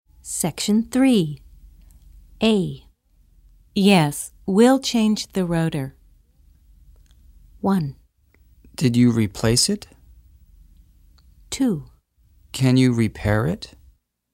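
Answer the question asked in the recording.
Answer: 2: Can you repair it?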